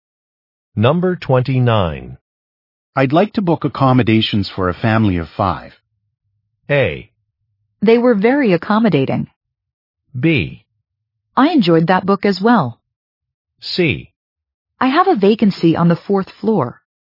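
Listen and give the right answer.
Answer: C: I have a vacancy on the fourth floor.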